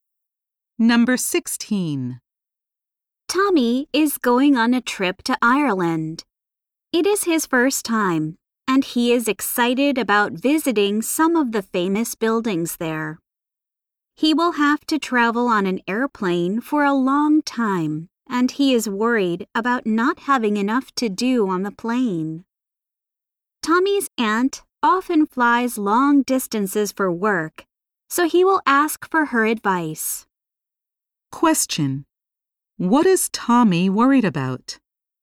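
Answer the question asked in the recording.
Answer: Not having enough to do on the long plane flight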